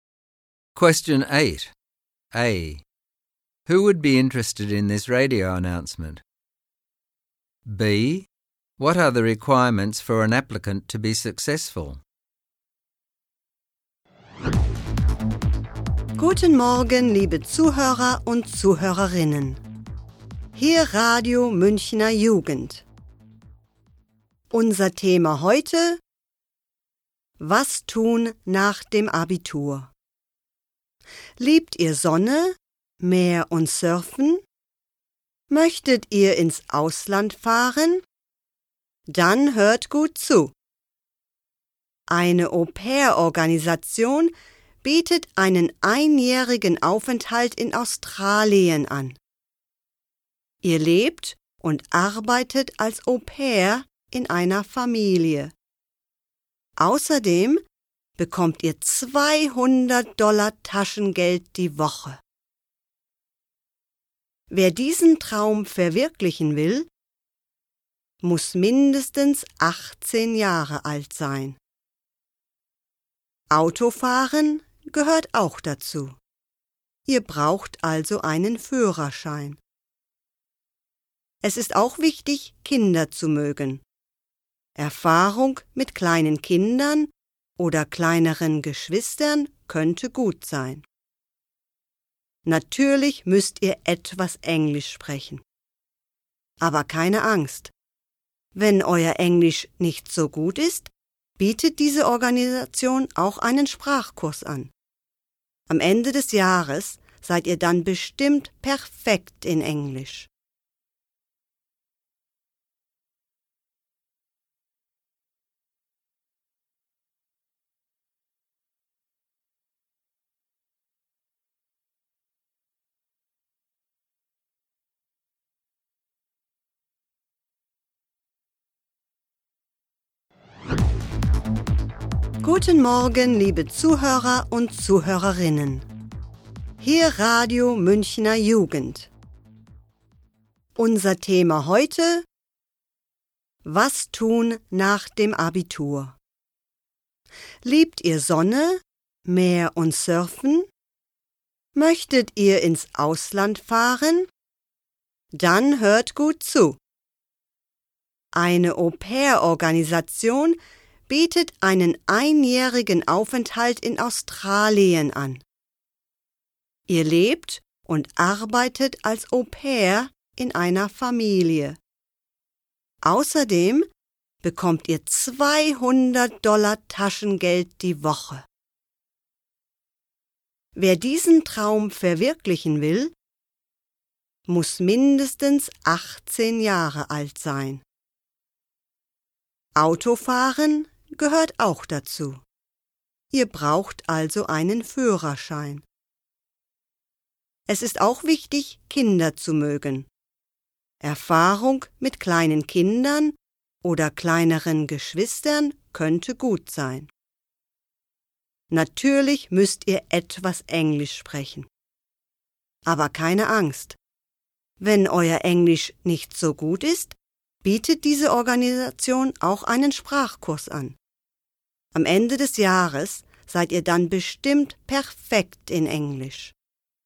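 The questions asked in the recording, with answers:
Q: Who would be interested in this radio announcement?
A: Young people finishing the Abitur who like sun, sea and surfing and want to go abroad (to Australia as au pairs).

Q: What are the requirements for an applicant to be successful?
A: At least 18, a driver's licence, like children (experience with young children helpful), and some English.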